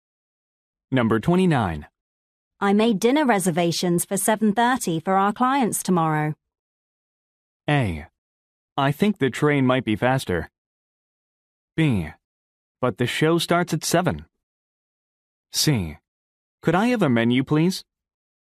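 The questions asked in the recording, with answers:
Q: I made dinner reservations for 7:30 for our clients tomorrow.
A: B: But the show starts at 7.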